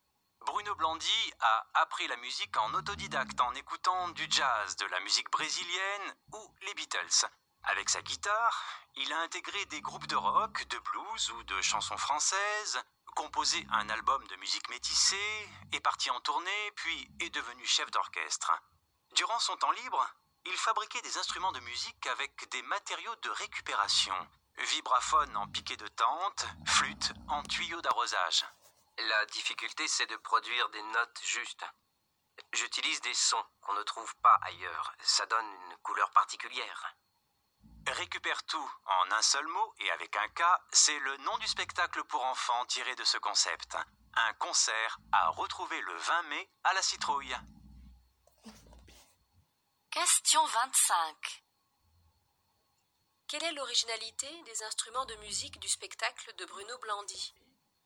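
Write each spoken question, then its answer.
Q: Quelle est l'originalité des instruments de musique du spectacle de Bruno Blandy ?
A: Ils sont fabriqués avec des matériaux de récupération.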